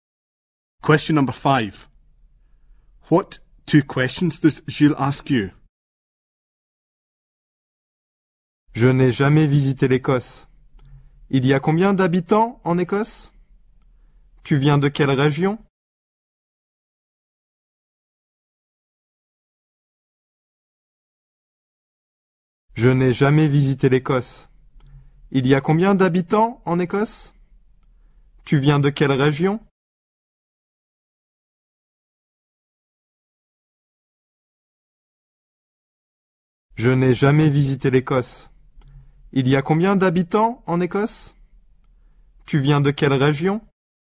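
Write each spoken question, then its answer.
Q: What 2 questions does Gilles ask you?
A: How many people live in Scotland? Which region do you come from?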